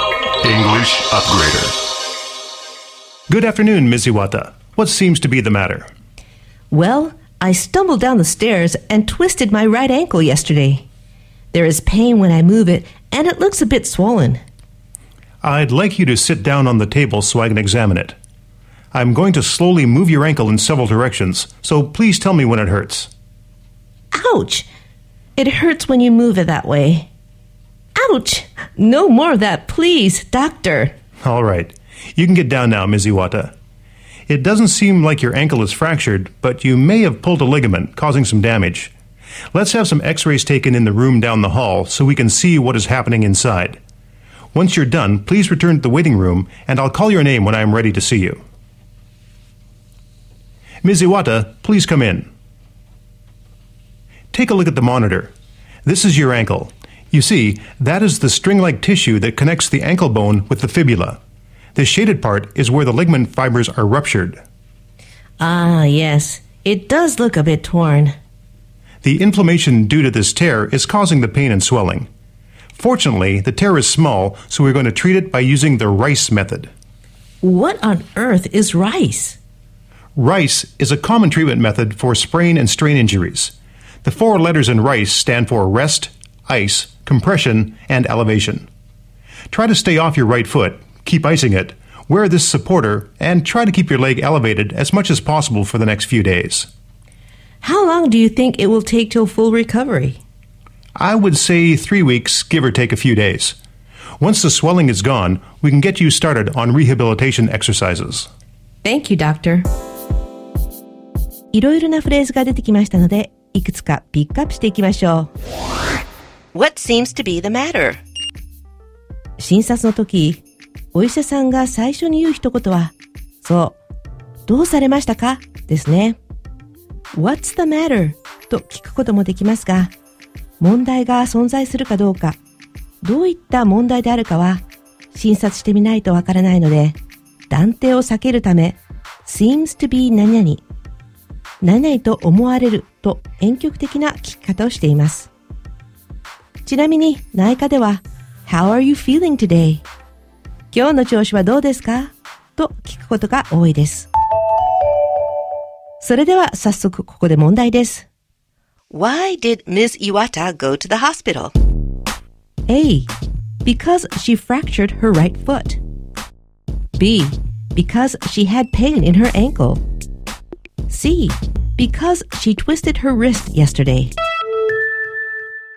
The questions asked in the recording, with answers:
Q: Why did Ms. Iwata go to the hospital?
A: B は足首に痛みを感じているので、これは彼女の説明 There is pain when I move it 動かすと痛みを感じると一致しているので、これが正解です。